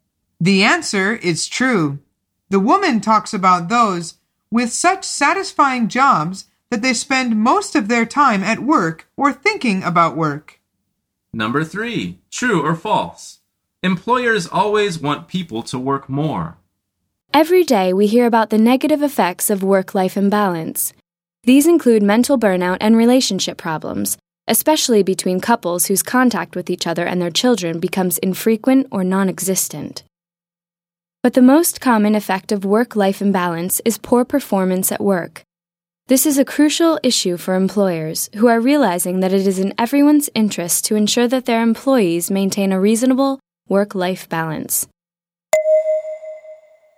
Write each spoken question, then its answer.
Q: Employers always want people to work more.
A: The answer is false.